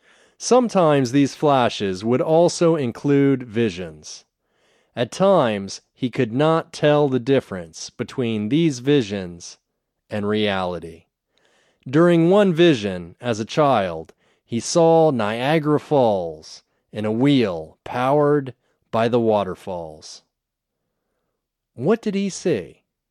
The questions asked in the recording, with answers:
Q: What did he see?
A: He saw Niagara Falls in a wheel powered by the waterfalls.